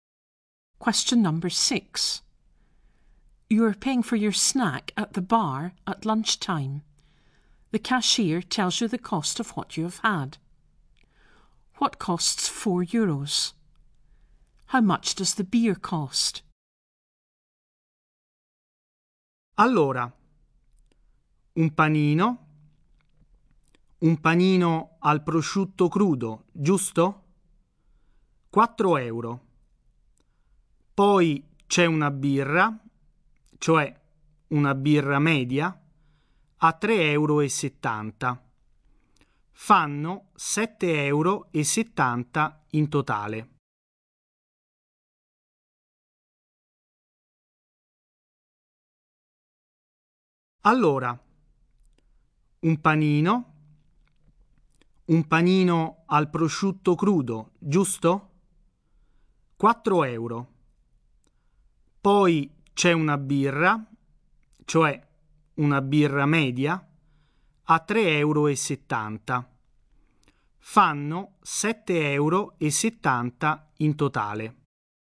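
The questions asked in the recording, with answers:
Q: What costs 4 euros?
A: A cured ham (prosciutto crudo) roll

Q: How much does the beer cost?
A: 3.70 euros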